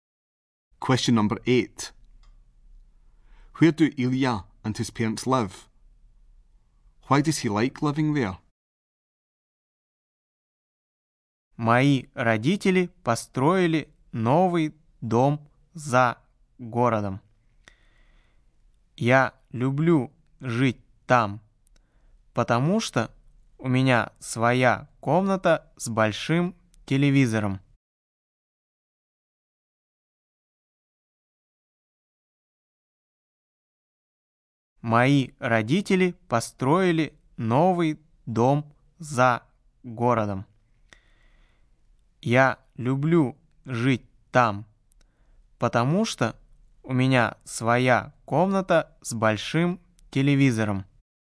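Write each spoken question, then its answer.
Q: Where do Илья and his parents live?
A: In a new house outside the city

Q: Why does he like living there?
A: He has his own room with a big TV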